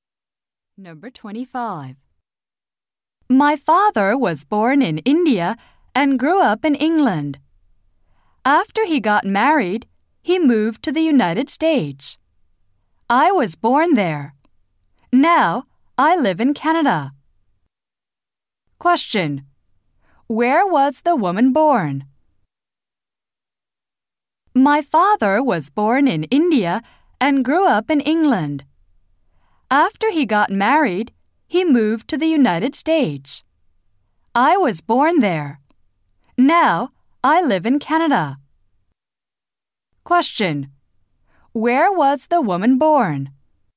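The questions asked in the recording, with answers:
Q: Where was the woman born?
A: In the United States.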